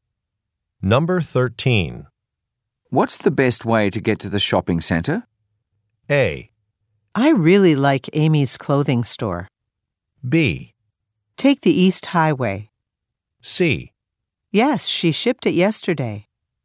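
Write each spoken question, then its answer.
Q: What's the best way to get to the shopping center?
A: B: Take the East Highway.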